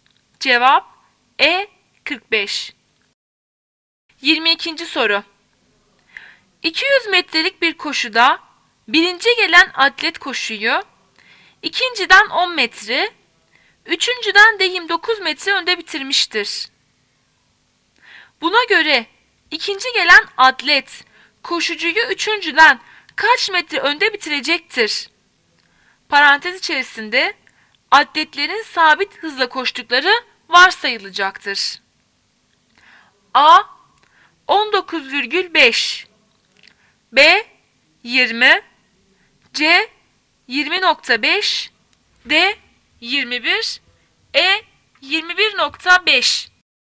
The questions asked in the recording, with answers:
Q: Buna göre ikinci gelen atlet koşucuyu üçüncüden kaç metre önde bitirecektir?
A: Cevap B 20.